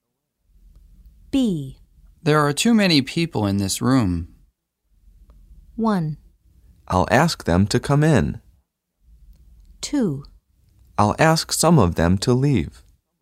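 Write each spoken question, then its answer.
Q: There are too many people in this room.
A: 2: I'll ask some of them to leave.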